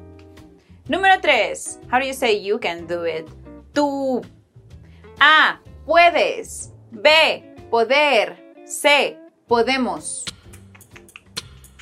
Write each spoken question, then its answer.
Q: How do you say you can do it? Tú. A, puedes. B, poder. C, podemos.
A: Puedes. Tú puedes.